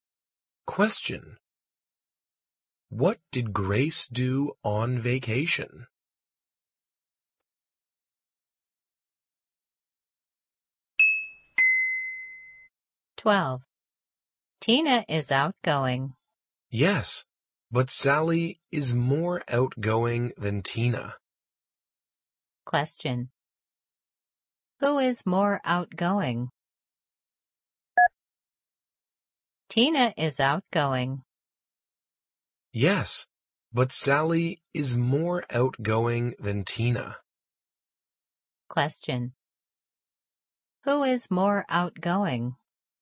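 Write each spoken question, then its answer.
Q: Who is more outgoing?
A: Sally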